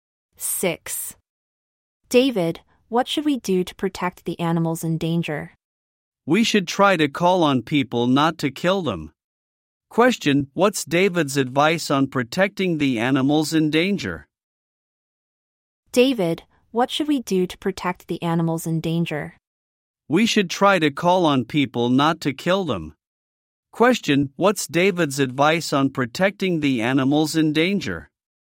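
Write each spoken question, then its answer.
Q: Question, what's David's advice on protecting the animals in danger?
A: Call on people not to kill them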